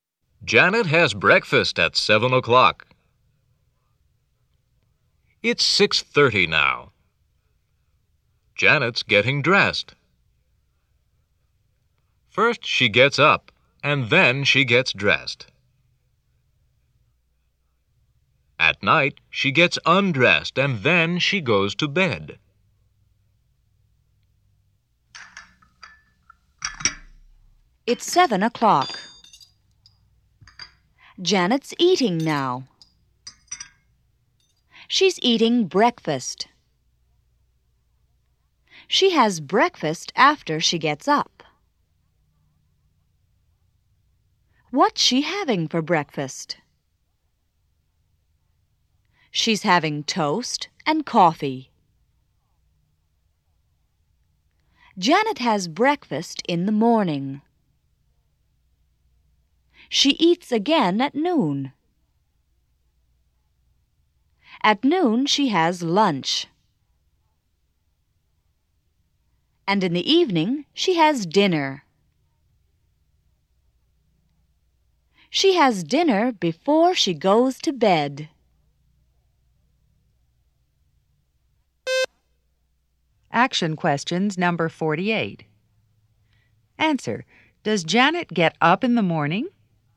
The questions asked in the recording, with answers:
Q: Does Janet get up in the morning?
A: Yes, she does.